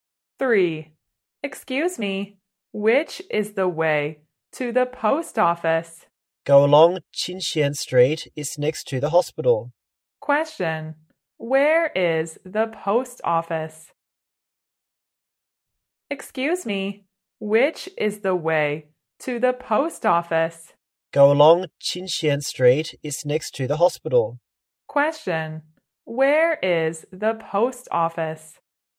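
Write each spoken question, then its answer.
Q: Where is the post office?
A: Next to the hospital on Qinxian Street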